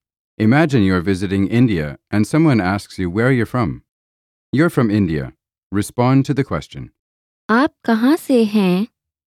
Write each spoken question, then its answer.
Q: आप कहाँ से हैं?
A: मैं भारत से हूँ.